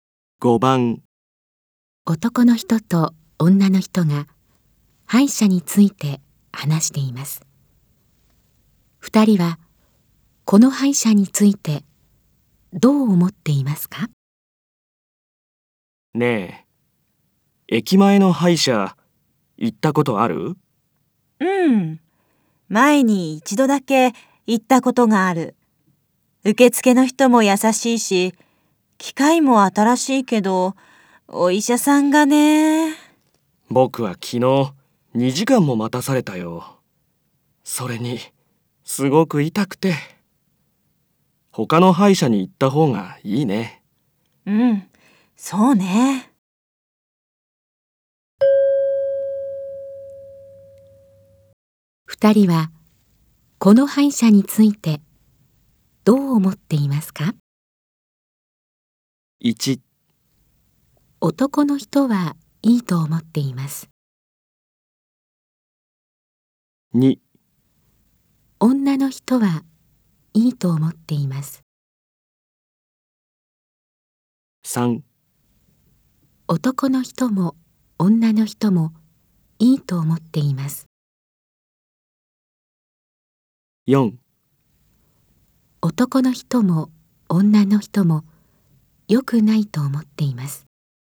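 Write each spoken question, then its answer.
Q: 二人は、この歯医者についてどう思っていますか?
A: 4: 男の人も女の人も良くないと思っています。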